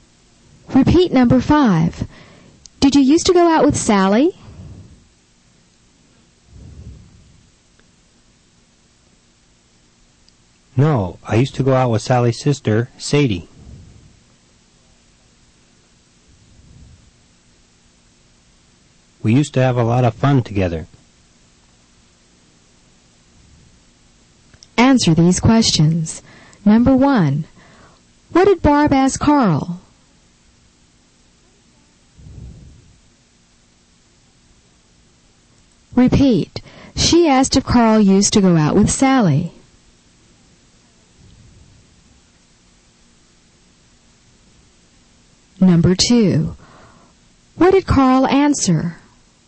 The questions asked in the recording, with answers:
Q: what did Barb ask Carl?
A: she asked if Carl used to go out with Sally.

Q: what did Carl answer?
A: that he used to go out with Sally's sister, Sadie.